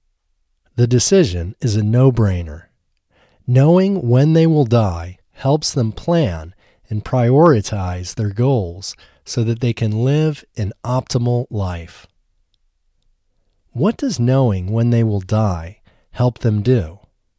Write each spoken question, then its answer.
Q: What does knowing when they will die help them do?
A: Knowing when they will die helps them plan and prioritize their goals.